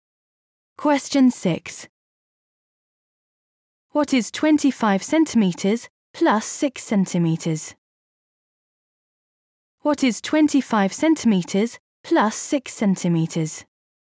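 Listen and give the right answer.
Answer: 31 centimetres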